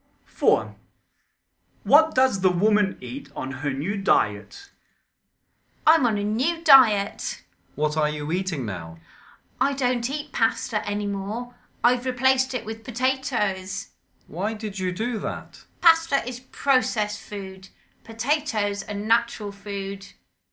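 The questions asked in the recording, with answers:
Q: What does the woman eat on her new diet?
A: Potatoes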